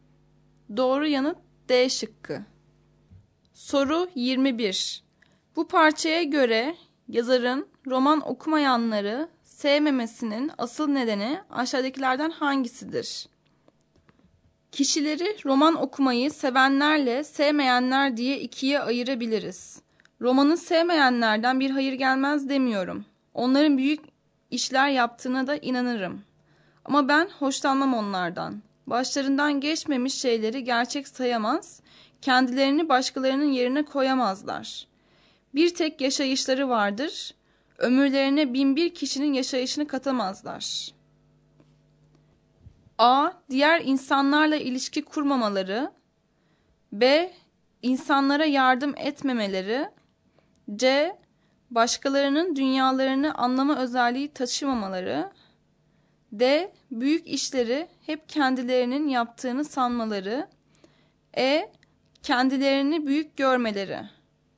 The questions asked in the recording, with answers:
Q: Bu parçaya göre yazarın roman okumayanları sevmemesinin asıl nedeni aşağıdakilerden hangisidir?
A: Doğru yanıt C şıkkı.